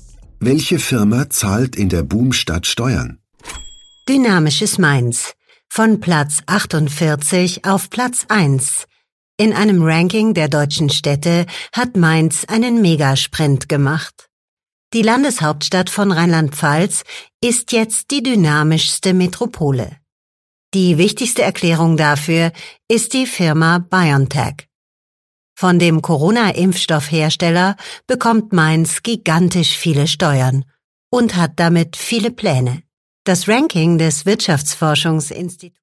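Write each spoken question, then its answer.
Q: Welche Firma zahlt in der Boomstadt Steuern?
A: BioNTech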